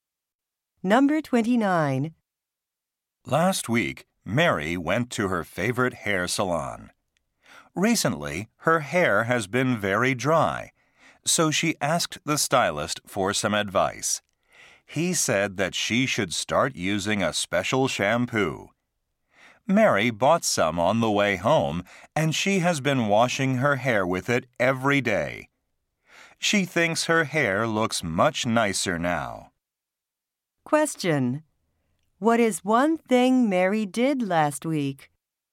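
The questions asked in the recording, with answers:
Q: What is one thing Mary did last week?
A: She asked her hair stylist for advice.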